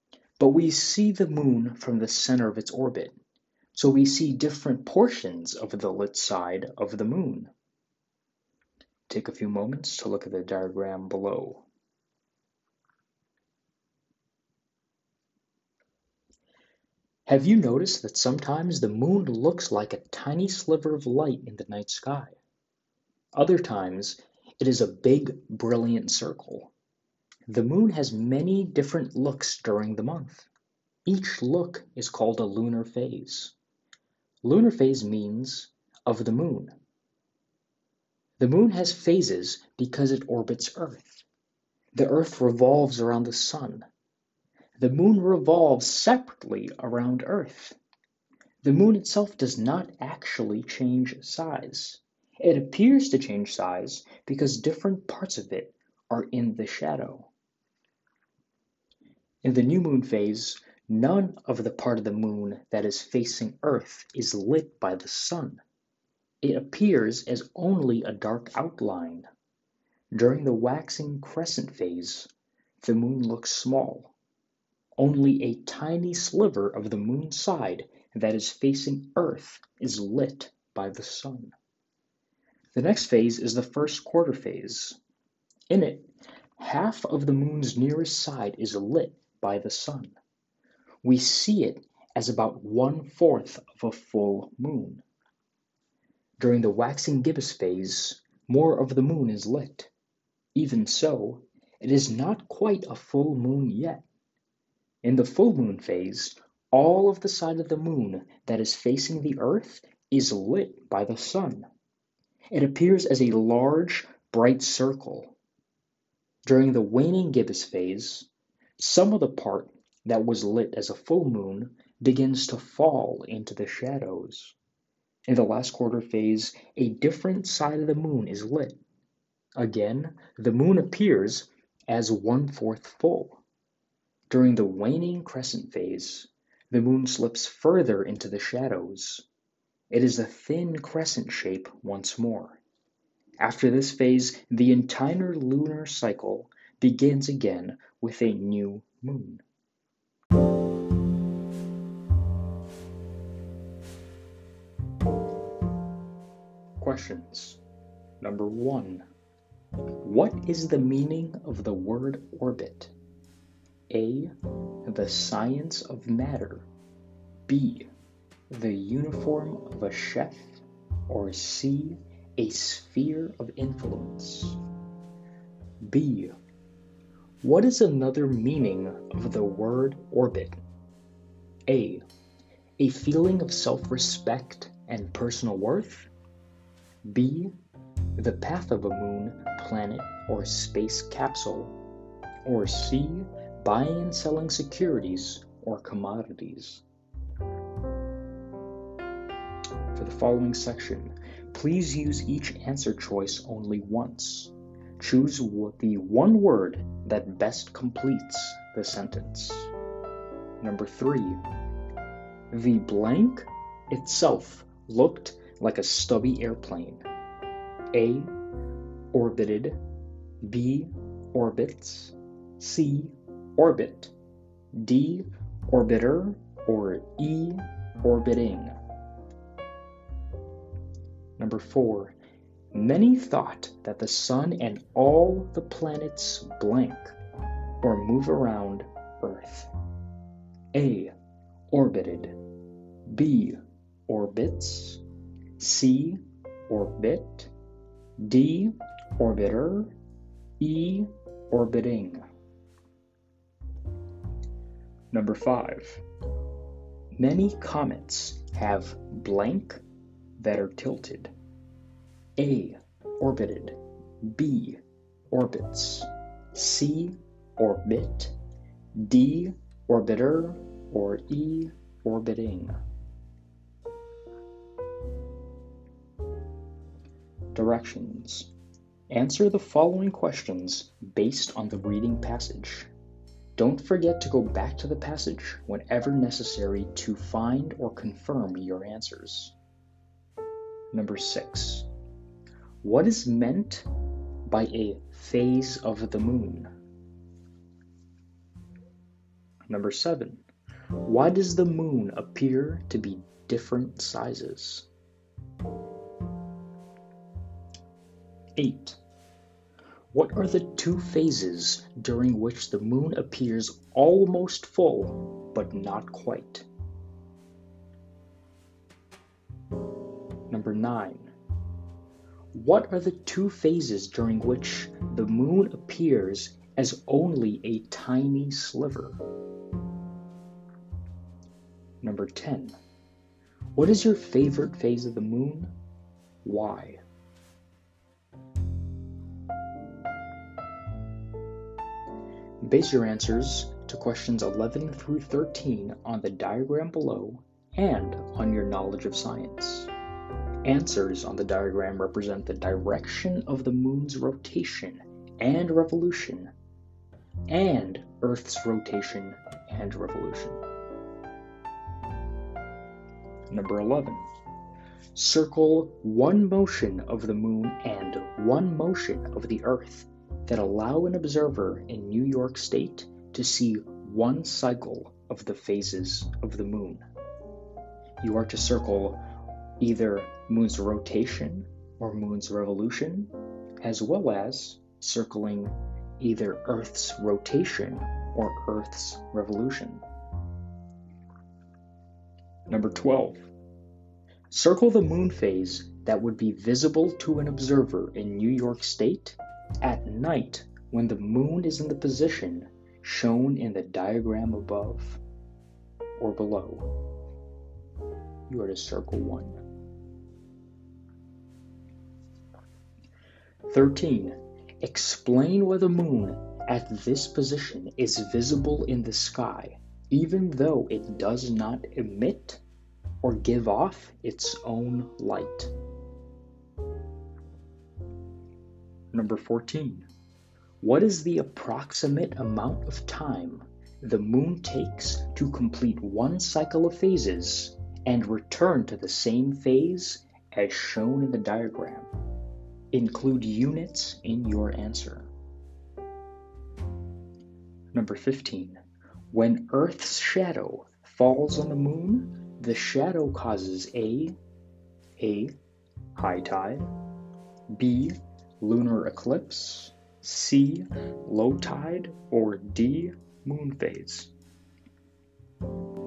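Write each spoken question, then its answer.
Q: What is another meaning of the word orbit?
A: B: The path of a moon, planet, or space capsule.

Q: the blank itself looked like a stubby airplane.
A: D: orbiter

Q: Many comets have blank that are tilted.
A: B: Orbits

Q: What is meant by a phase of the moon?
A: Each different look of the moon during the month

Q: Why does the moon appear to be different sizes?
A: Because different parts of it are in the shadow

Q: What are the two phases during which the moon appears almost full, but not quite?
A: Waxing gibbous and waning gibbous

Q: What are the two phases during which the moon appears as only a tiny sliver?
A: Waxing crescent and waning crescent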